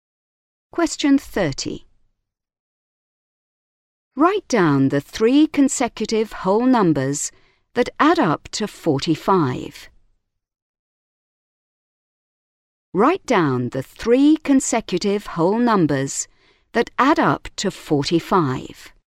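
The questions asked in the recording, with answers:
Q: Write down the three consecutive whole numbers that add up to 45.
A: 14, 15, 16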